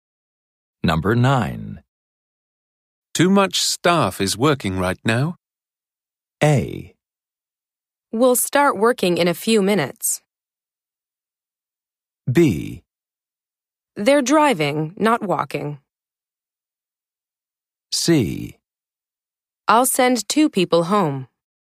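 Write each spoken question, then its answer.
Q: Too much staff is working right now.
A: C: I'll send two people home.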